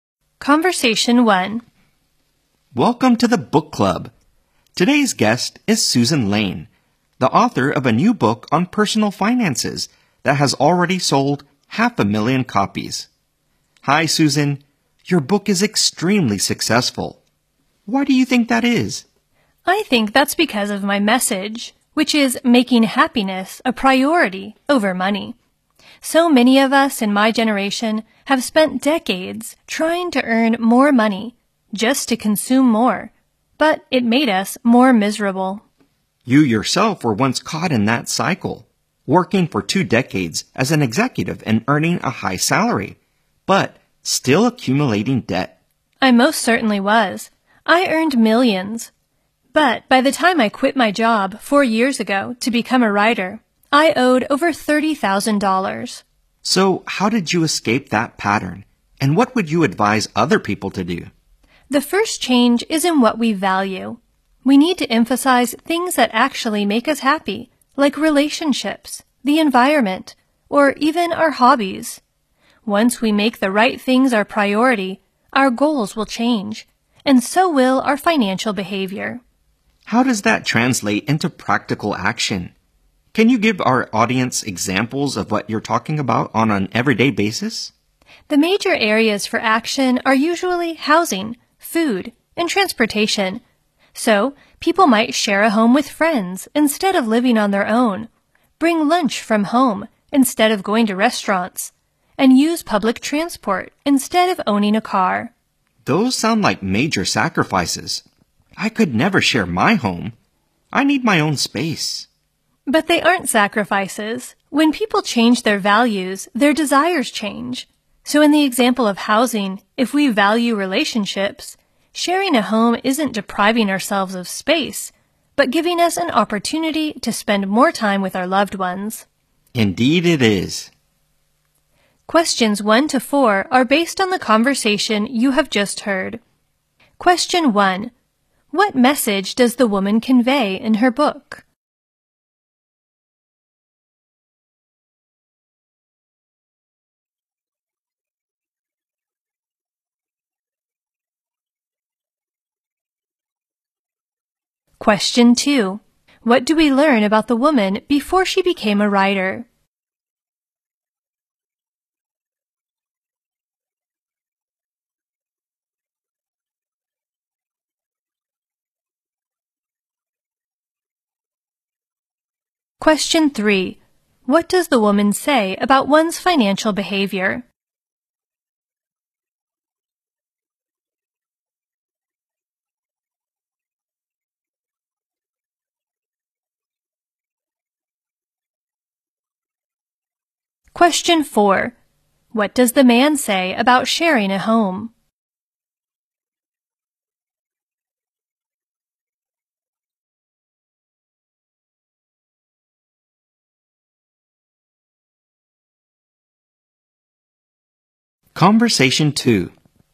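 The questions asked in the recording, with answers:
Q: What message does the woman convey in her book?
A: Making happiness a priority over money

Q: What do we learn about the woman before she became a writer?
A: She earned a high salary as an executive but still owed over $30,000

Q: What does the woman say about one's financial behavior?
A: It changes once we make the right things our priority

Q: What does the man say about sharing a home?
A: He could never do it because he needs his own space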